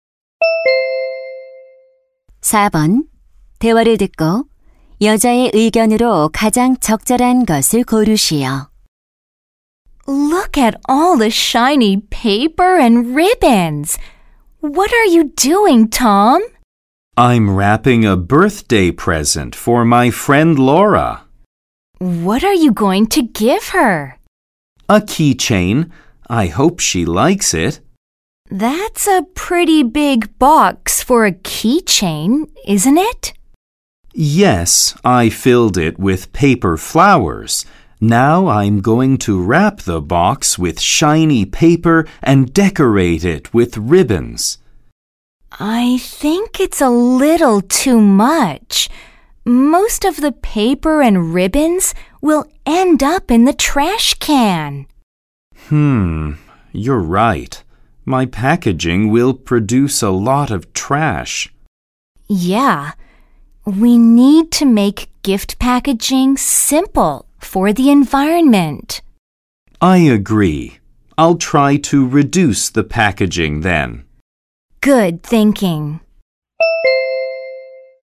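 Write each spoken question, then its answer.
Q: 대화를 듣고 여자의 의견으로 가장 적절한 것을 고르시오.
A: 환경을 위해 선물 포장을 간소화해야 한다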